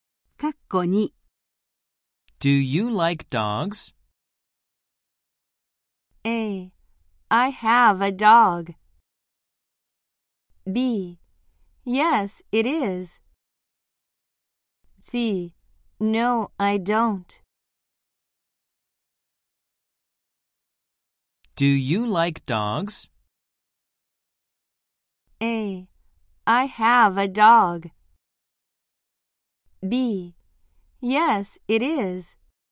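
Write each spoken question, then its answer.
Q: Do you like dogs?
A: C: No, I don't.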